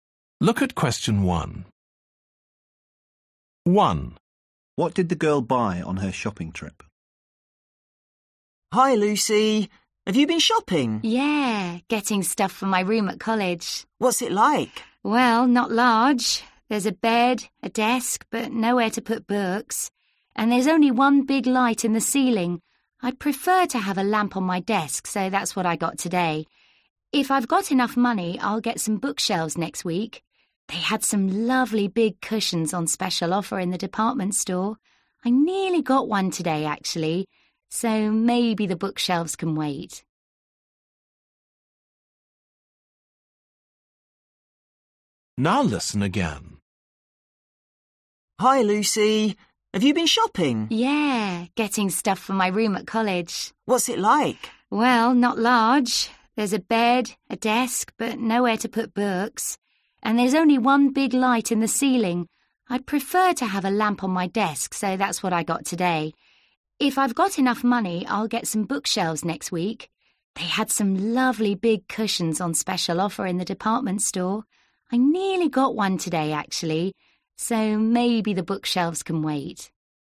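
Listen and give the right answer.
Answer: a desk lamp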